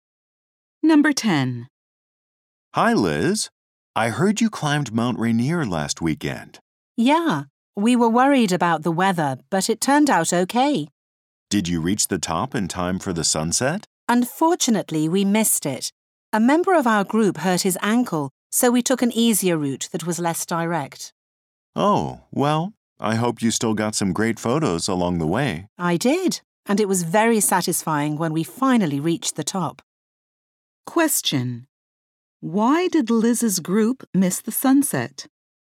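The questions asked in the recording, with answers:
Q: Why did Liz's group miss the sunset?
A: A group member hurt his ankle, so they took an easier, less direct route.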